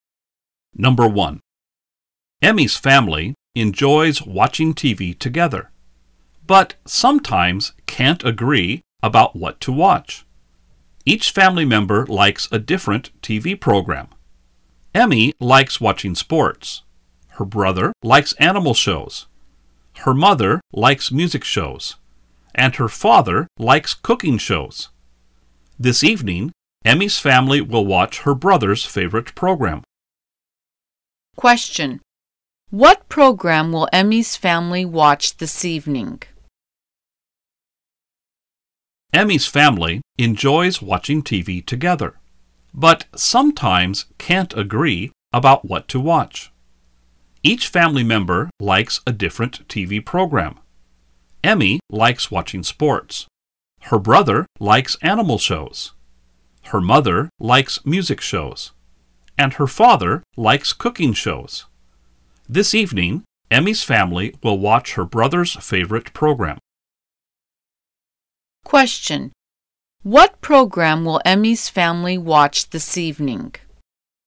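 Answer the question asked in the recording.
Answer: An animal show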